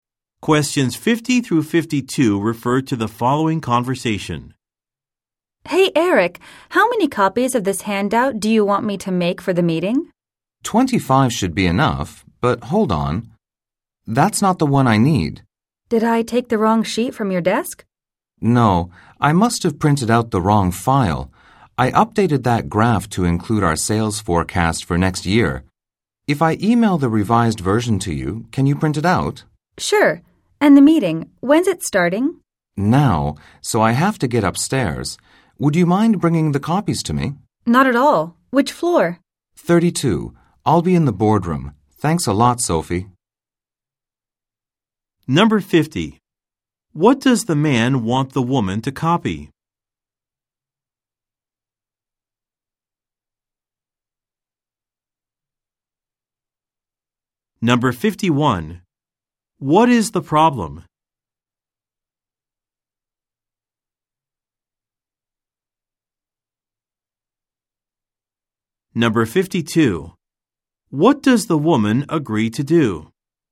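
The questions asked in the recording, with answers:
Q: What does the man want the woman to copy?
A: A handout for the meeting

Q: What is the problem?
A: The man printed out the wrong file

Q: What does the woman agree to do?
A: Bring the copies to the man in the boardroom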